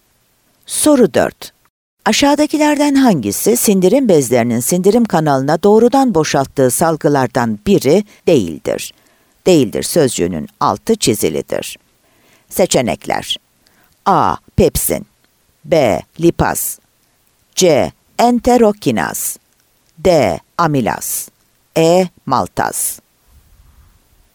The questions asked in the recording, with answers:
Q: Aşağıdakilerden hangisi sindirim bezlerinin sindirim kanalına doğrudan boşalttığı salgılardan biri değildir?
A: Adana